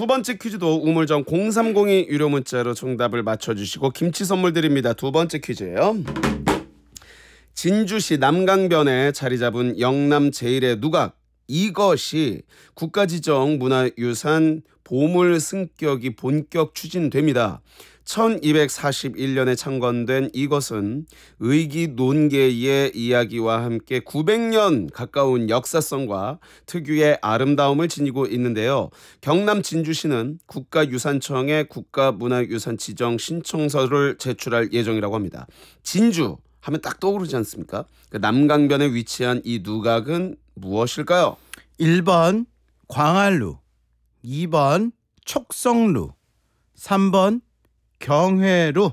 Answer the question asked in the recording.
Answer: 정답은 2번이었습니다. 촉성루.